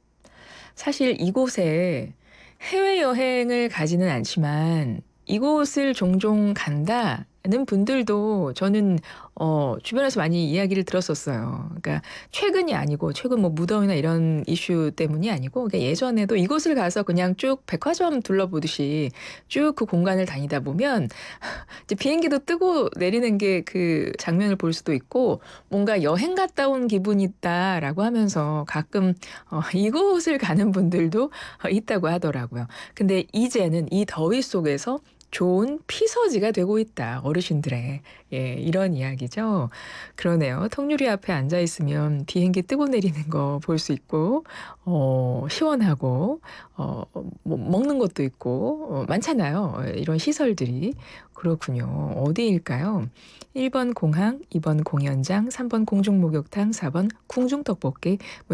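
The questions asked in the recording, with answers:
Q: 어디일까요? 1번 공항, 2번 공연장, 3번 공중목욕탕, 4번 궁중떡볶이.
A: 1: 공항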